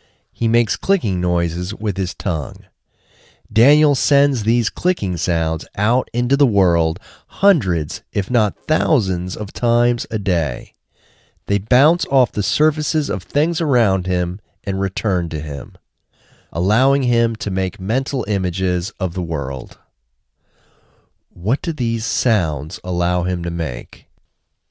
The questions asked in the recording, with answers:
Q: What do these sounds allow him to make?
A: These sounds allow him to make mental images of the world.